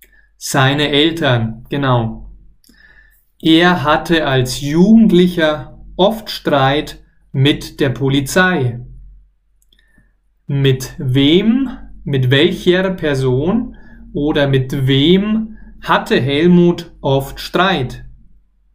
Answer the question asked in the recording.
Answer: mit der Polizei.